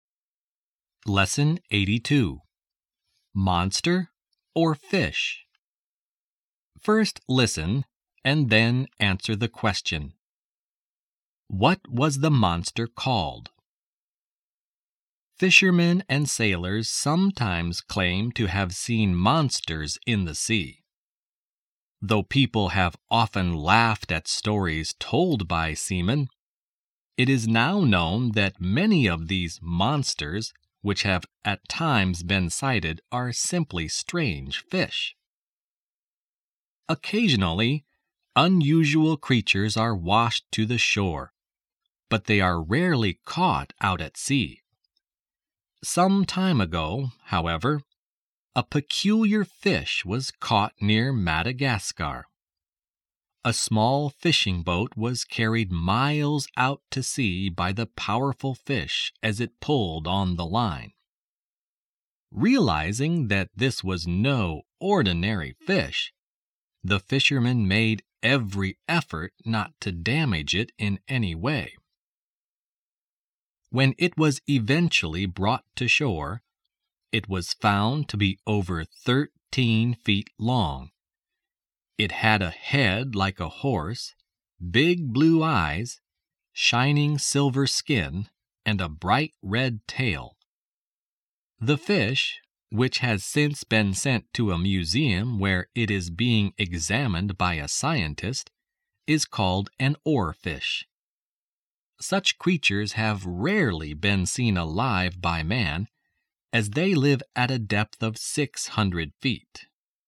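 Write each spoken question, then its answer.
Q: What was the monster called?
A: An oarfish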